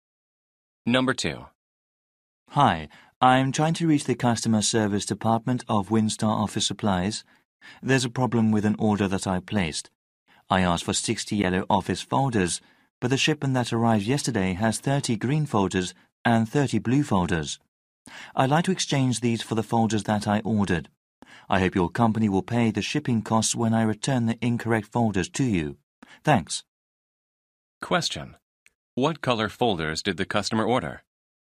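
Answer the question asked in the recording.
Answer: Yellow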